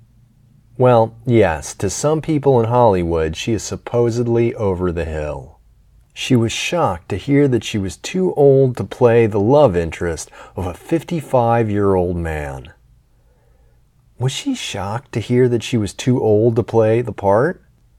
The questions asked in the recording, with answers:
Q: Was she shocked to hear that she was too old to play the part?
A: Yes, she was shocked to hear she was too old to play the part.